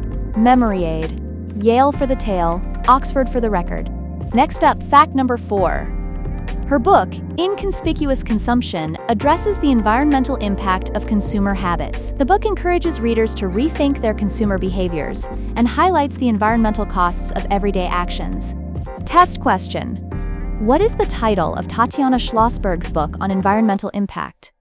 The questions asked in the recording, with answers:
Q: What is the title of Tatiana Schlossberg's book on environmental impact?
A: Inconspicuous Consumption.